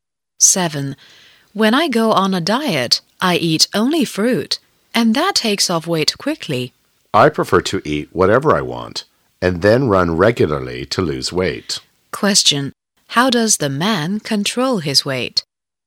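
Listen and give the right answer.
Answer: By running regularly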